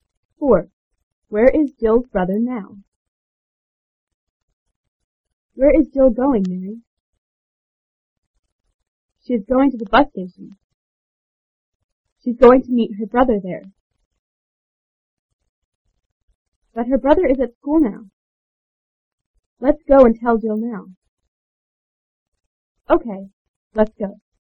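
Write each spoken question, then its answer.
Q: Where is Jill's brother now?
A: At school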